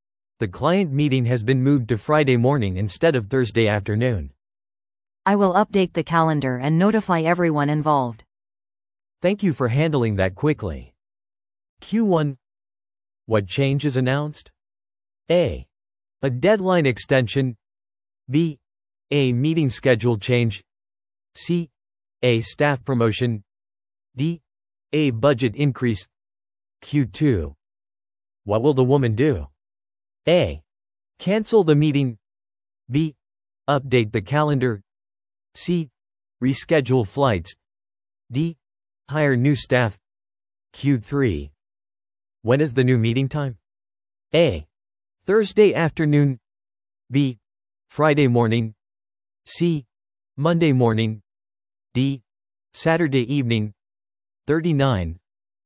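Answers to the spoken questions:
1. B: A meeting schedule change.
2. B: Update the calendar.
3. B: Friday morning.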